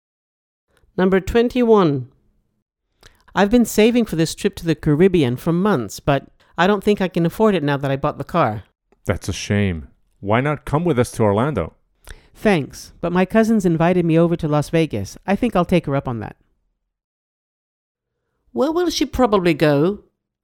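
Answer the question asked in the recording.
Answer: Las Vegas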